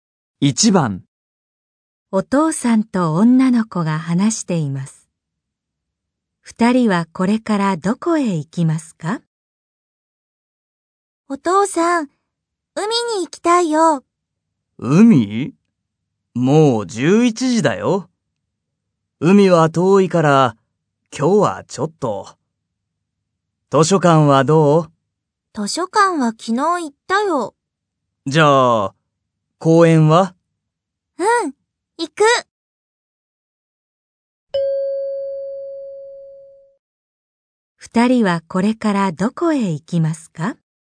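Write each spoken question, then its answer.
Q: 二人はこれからどこへ行きますか?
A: 公園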